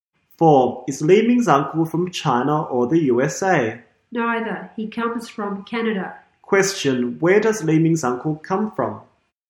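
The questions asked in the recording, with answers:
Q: Question. Where does Li Ming's uncle come from?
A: Canada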